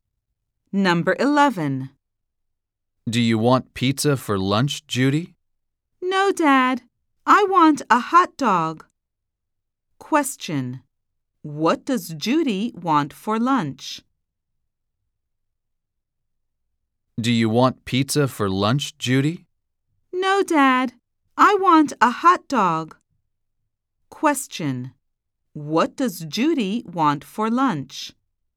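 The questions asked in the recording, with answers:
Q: What does Judy want for lunch?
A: A hot dog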